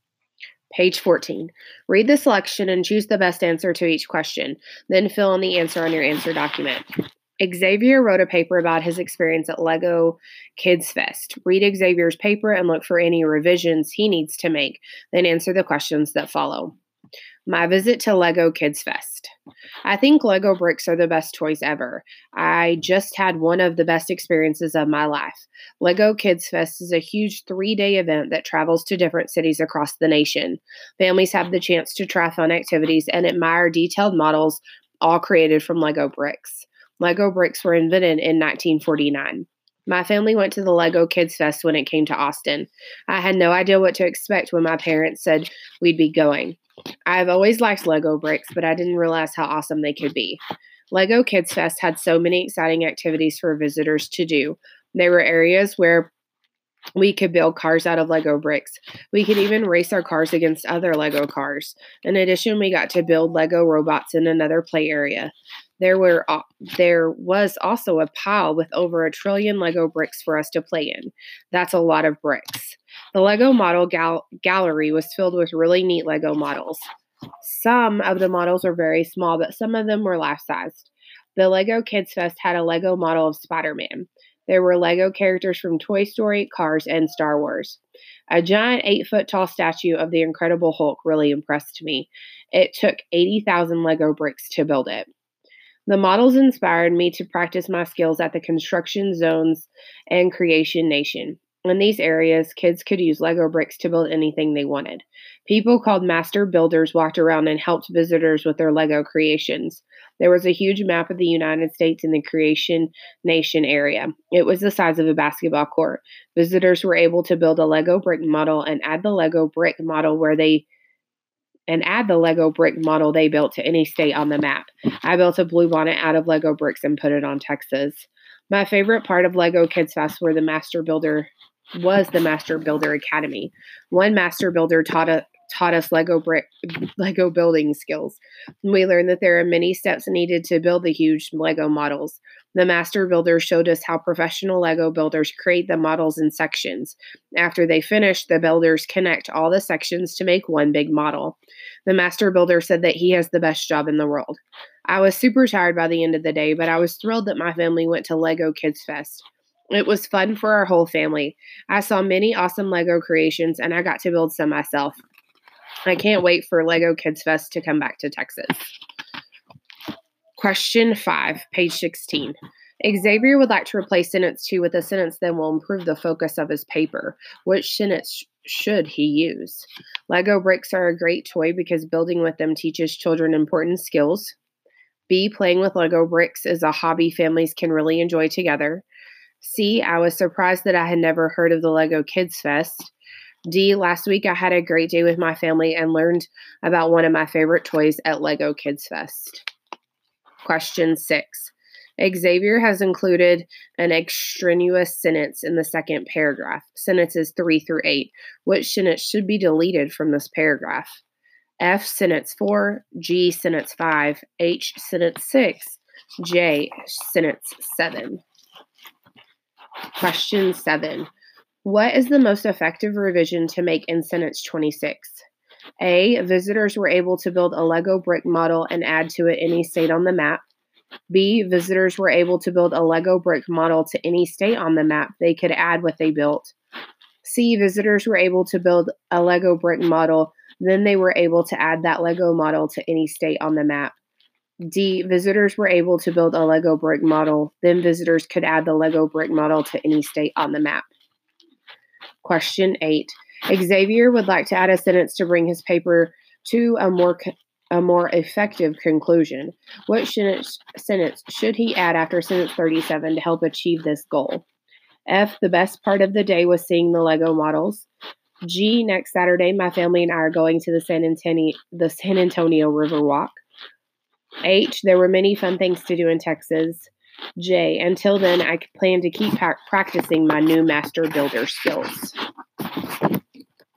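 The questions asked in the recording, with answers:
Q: Which sentence should he use?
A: D: last week I had a great day with my family and learned about one of my favorite toys at Lego Kids Fest.

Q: Which sentence should be deleted from this paragraph?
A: G: sentence 5.

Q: What sentence should he add after sentence 37 to help achieve this goal?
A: J: until then, I plan to keep practicing my new Master Builder skills.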